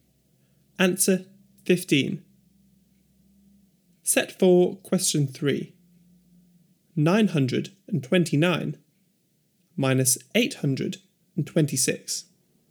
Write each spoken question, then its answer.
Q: 929 minus 826.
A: 103.